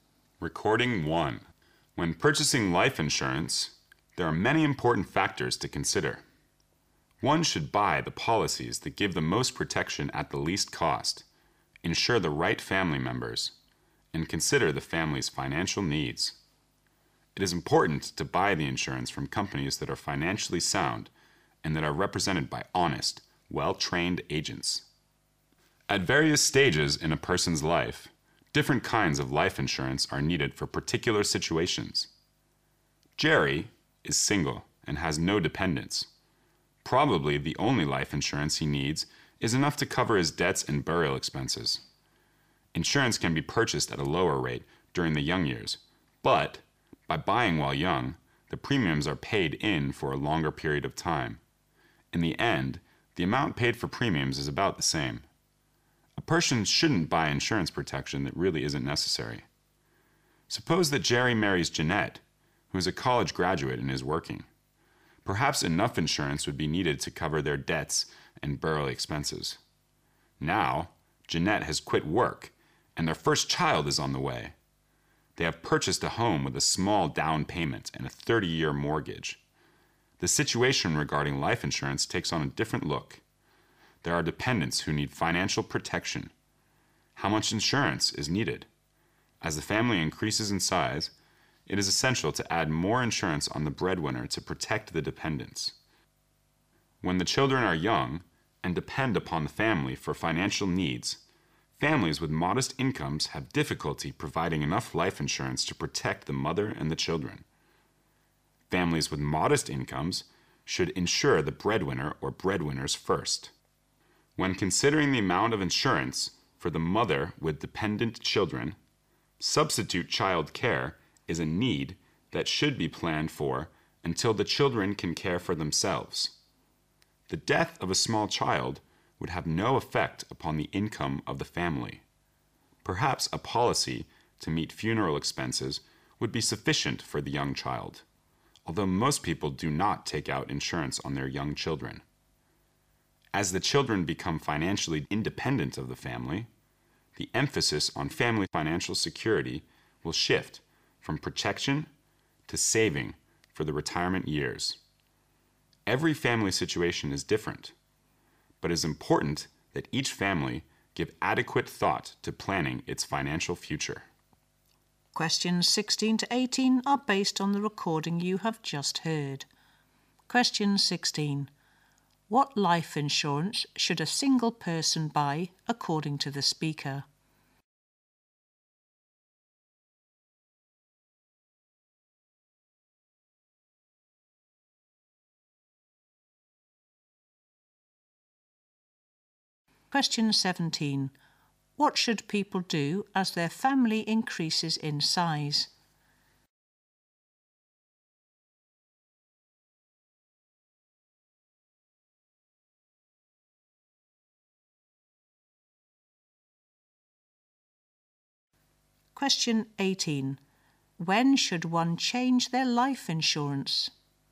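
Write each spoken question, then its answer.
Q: What life insurance should a single person buy according to the speaker?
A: Just enough to cover debts and burial expenses

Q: What should people do as their family increases in size?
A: Add more insurance on the breadwinner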